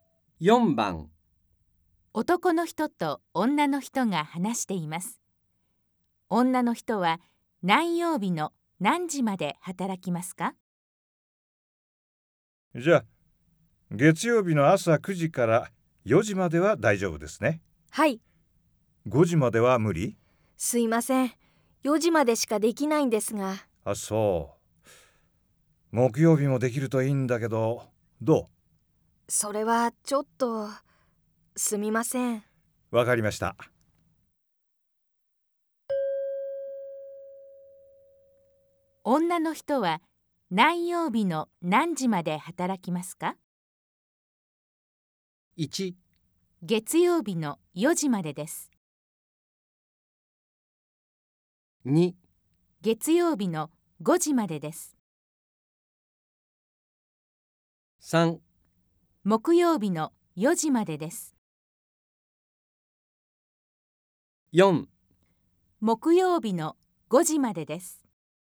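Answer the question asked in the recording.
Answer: 1: 月曜日の4時までです。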